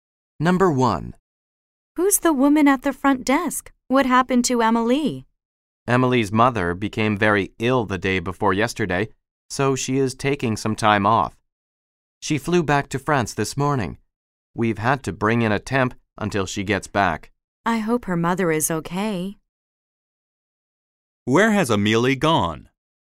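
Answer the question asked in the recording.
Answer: France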